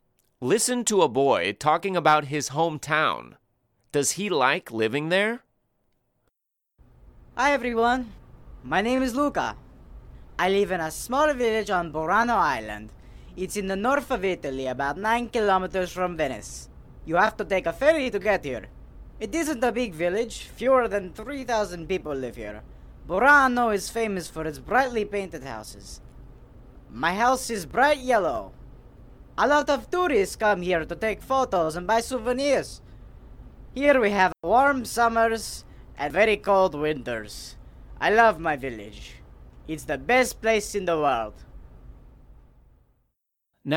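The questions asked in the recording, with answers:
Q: Does he like living there?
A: Yes, he loves his village; it's the best place in the world.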